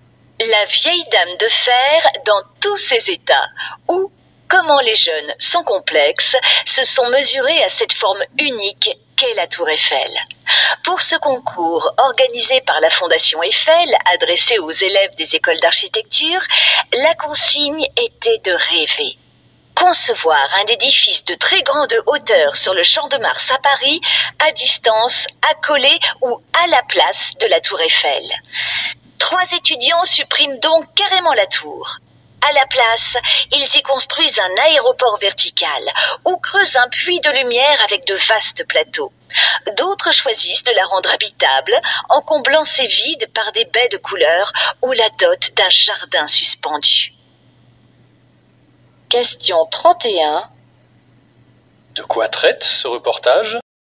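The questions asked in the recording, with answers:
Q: De quoi traite ce reportage ?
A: D'un concours d'architecture pour étudiants : imaginer un immeuble de très grande hauteur sur le Champ de Mars, à côté ou à la place de la tour Eiffel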